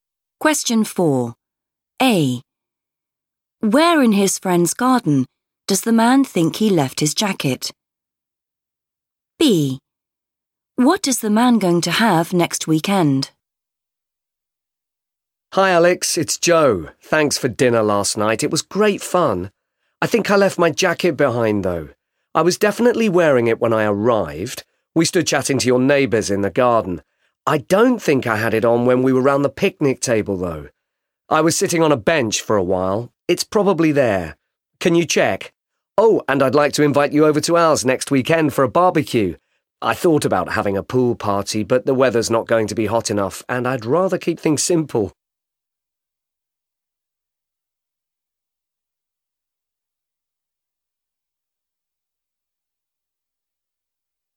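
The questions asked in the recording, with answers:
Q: Where in his friend's garden does the man think he left his jacket?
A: on a bench

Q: What is the man going to have next weekend?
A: a barbecue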